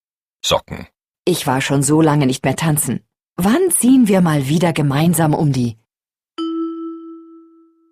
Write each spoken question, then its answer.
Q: Wann ziehen wir mal wieder gemeinsam um die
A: Häuser?